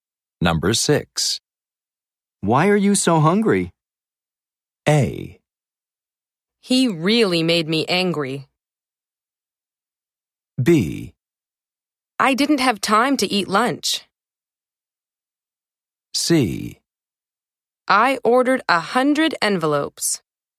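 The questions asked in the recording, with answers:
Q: Why are you so hungry?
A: B: I didn't have time to eat lunch.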